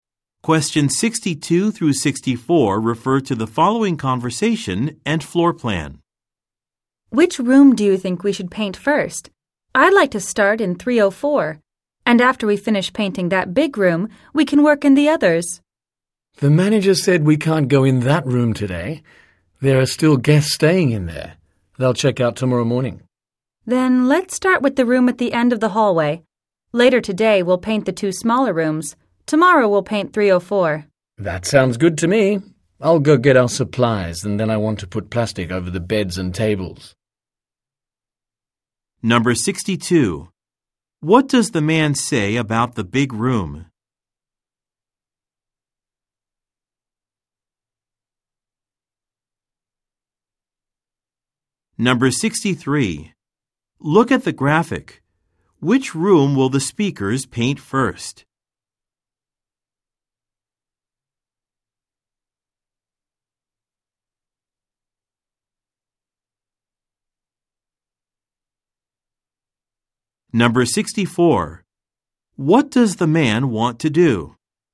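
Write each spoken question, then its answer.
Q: What does the man say about the big room?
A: Guests are still staying in it, so they can't go in today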